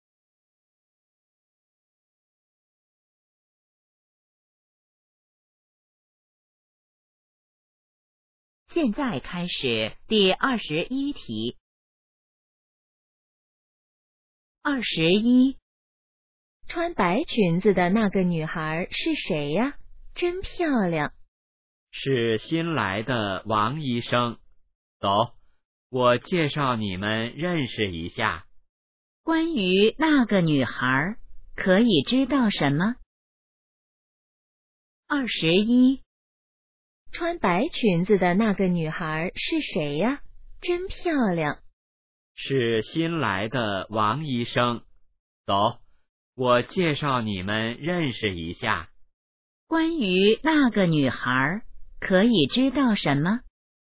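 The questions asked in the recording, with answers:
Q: 关于那个女孩可以知道什么?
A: 她是新来的医生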